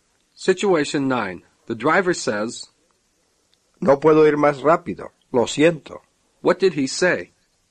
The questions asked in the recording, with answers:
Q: What did he say?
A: I cannot go faster. I am sorry.